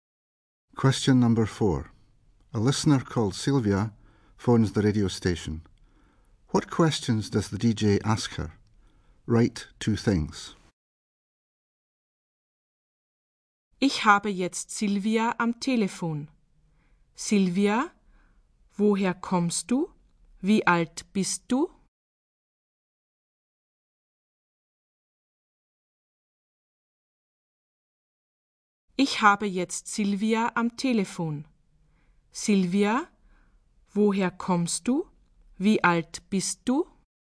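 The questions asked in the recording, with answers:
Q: What questions does the DJ ask her?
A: Where she comes from and how old she is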